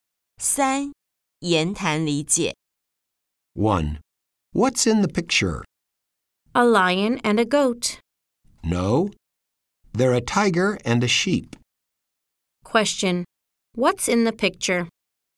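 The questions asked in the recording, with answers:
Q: What's in the picture?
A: A tiger and a sheep.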